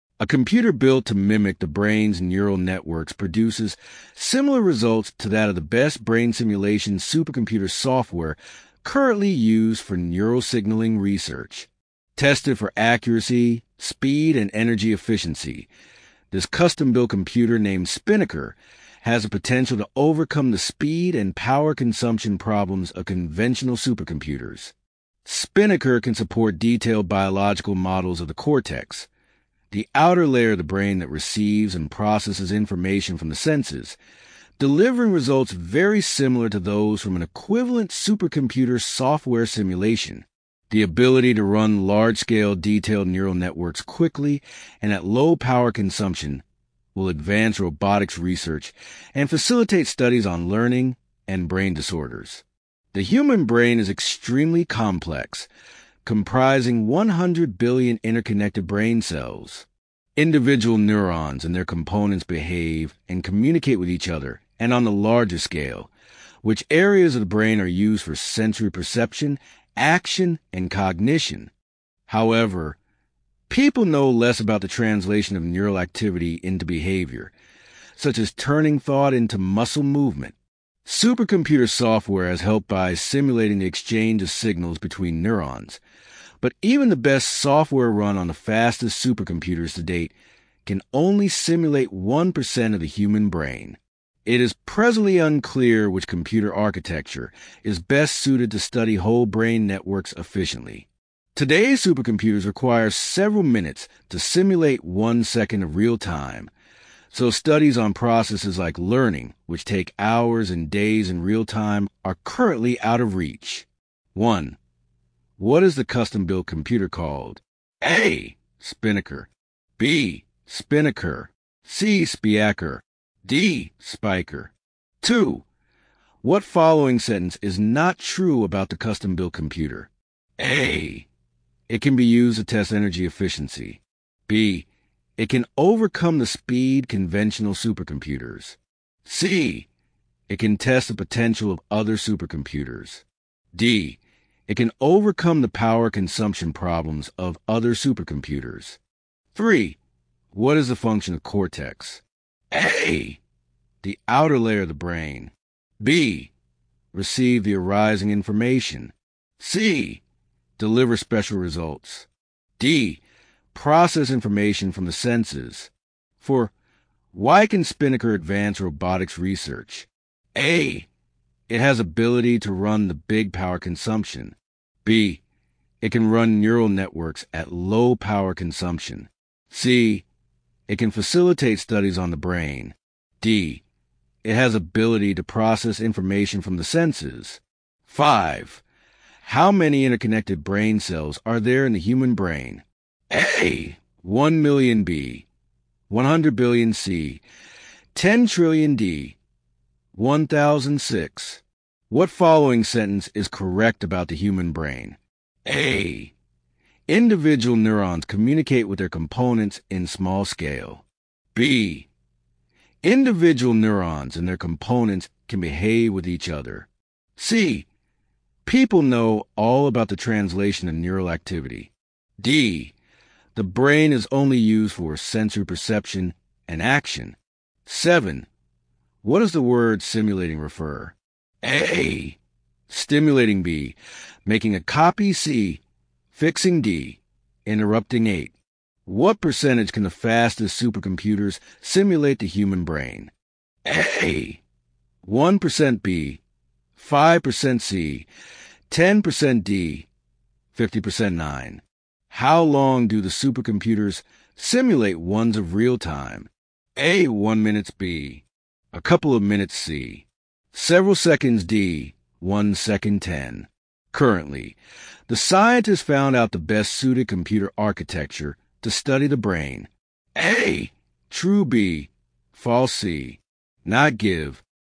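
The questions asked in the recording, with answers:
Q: What following sentence is not true about the custom-built computer?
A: C: It can test the potential of other supercomputers.

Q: What is the function of cortex?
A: D: Process information from the senses.

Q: Why can Spinnaker advance robotics research?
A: B: It can run neural networks at low power consumption.

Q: How many interconnected brain cells are there in the human brain?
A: B: 100 billion

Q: What does the word simulating refer?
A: B: Making a copy

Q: What percentage can the fastest supercomputers simulate the human brain?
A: A: 1%

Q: Currently, the scientists found out the best suited computer architecture to study the brain.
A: B: False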